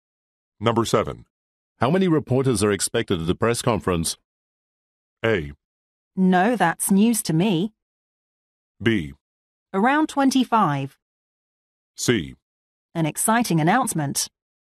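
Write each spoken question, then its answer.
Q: How many reporters are expected at the press conference?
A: B: Around 25.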